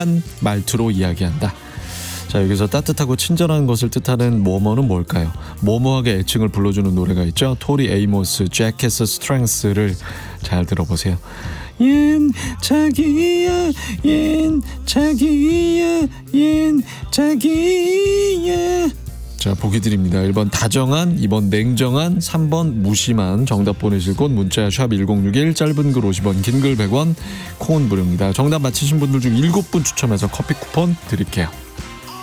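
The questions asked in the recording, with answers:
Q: 자, 여기서 따뜻하고 친절한 것을 뜻하는 뭐뭐는 뭘까요?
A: 1: 다정한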